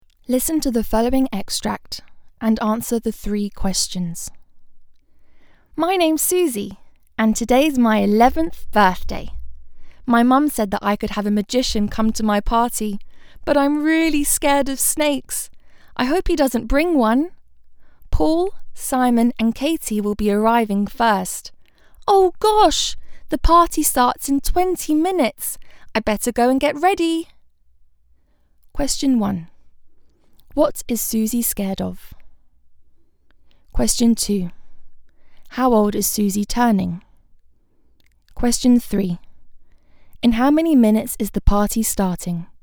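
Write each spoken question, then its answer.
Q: What is Susie scared of?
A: Snakes

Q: How old is Susie turning?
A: 11

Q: In how many minutes is the party starting?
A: 20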